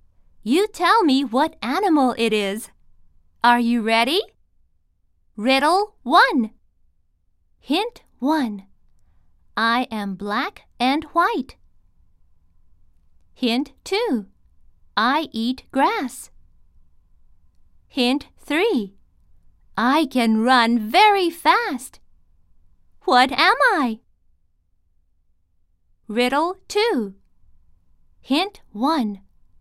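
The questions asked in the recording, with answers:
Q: What am I?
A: a zebra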